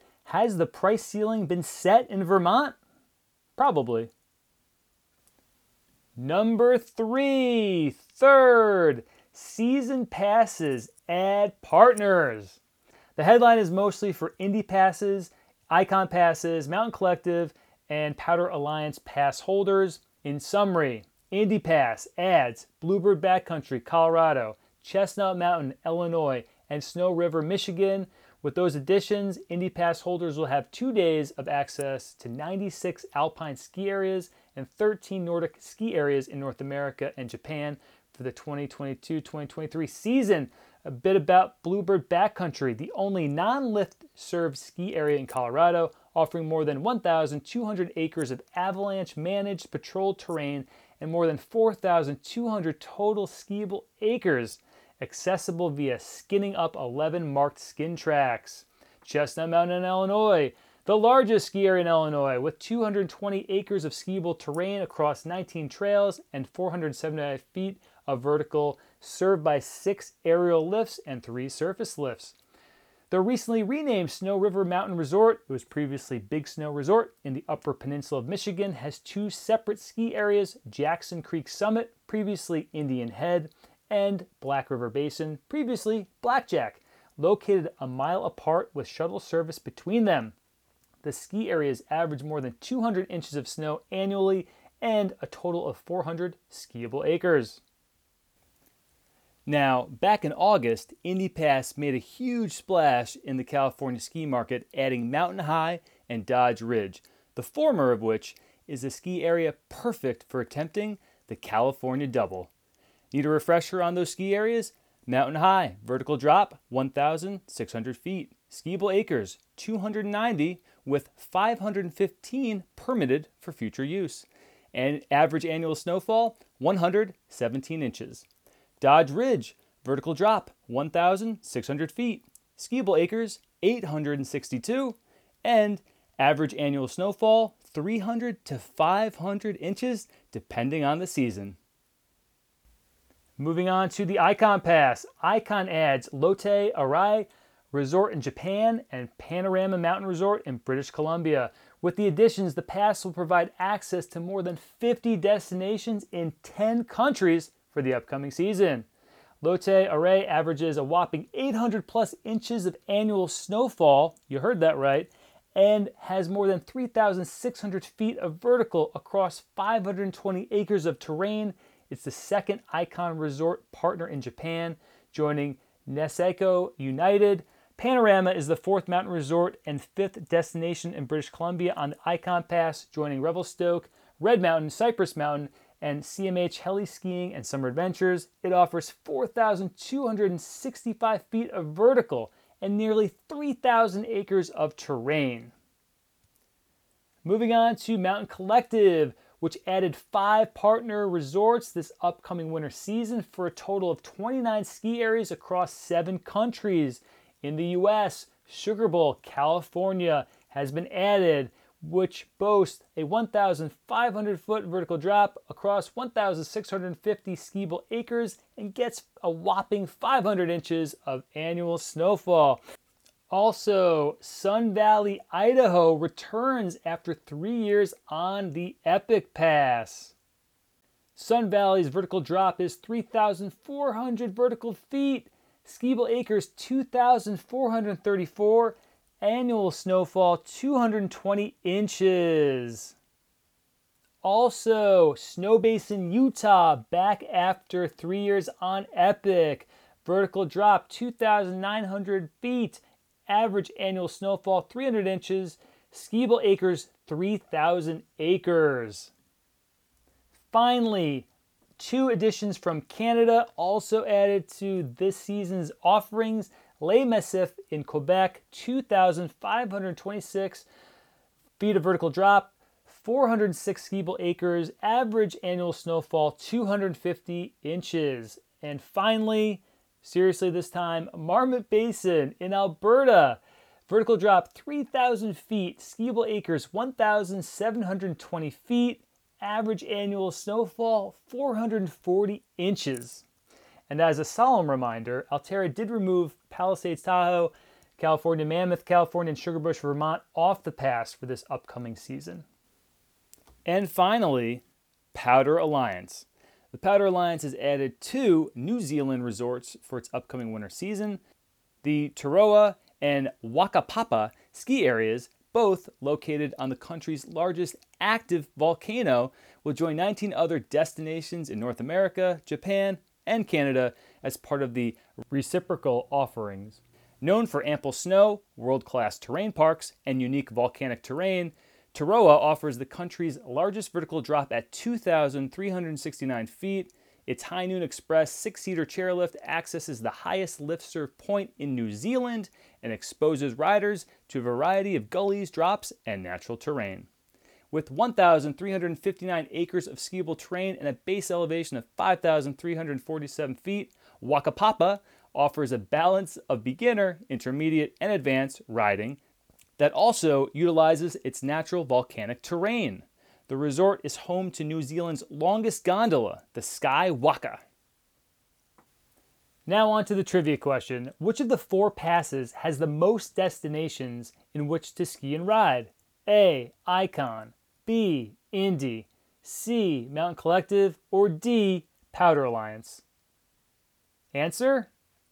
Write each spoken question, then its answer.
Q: Which of the four passes has the most destinations in which to ski and ride?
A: B, the Indy Pass.